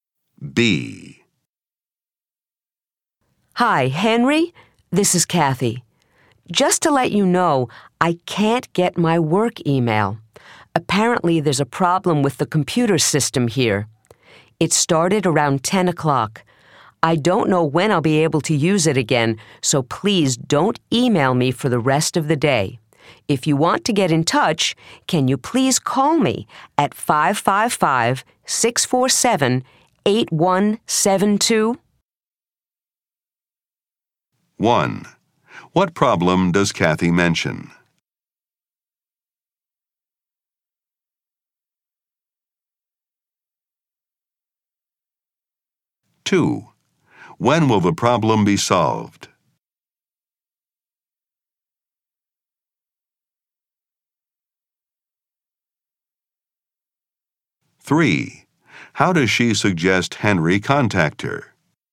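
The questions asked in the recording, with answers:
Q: What problem does Kathy mention?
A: She can't get her work email because of a computer system problem

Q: When will the problem be solved?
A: She doesn't know

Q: How does she suggest Henry contact her?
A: By phoning her at 555-647-8172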